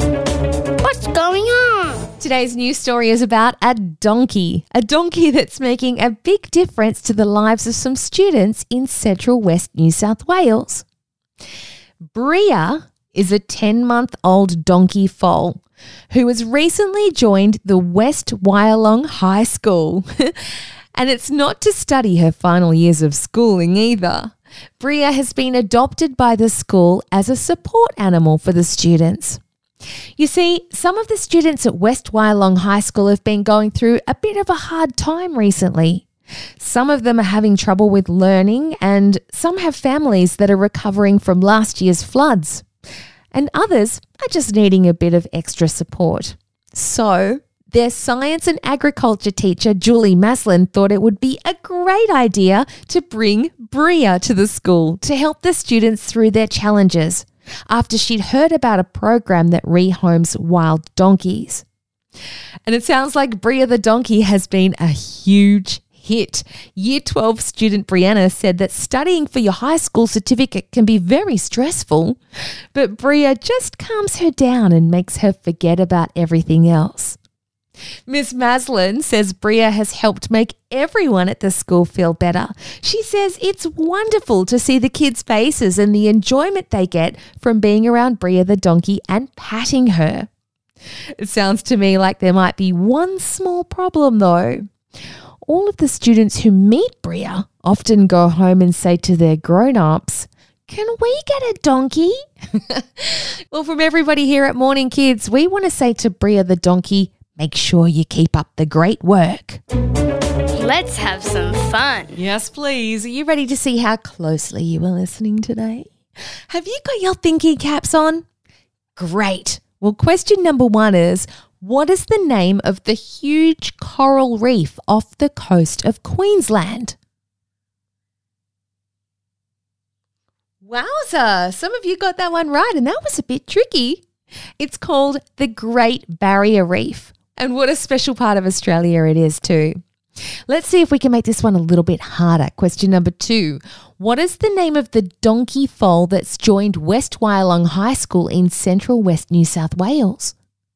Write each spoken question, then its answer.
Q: What is the name of the donkey foal that's joined West Wyalong High School in central west New South Wales?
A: Bria is the super special donkey that's making a huge difference to the students at the school.